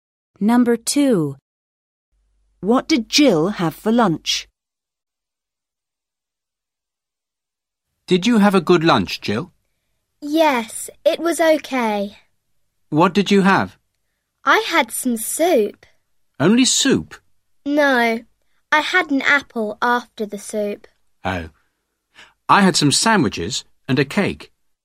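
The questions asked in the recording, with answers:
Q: What did Jill have for lunch?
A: Some soup and an apple.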